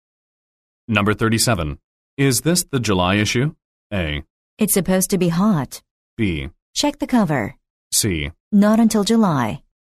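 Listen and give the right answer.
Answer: B: Check the cover.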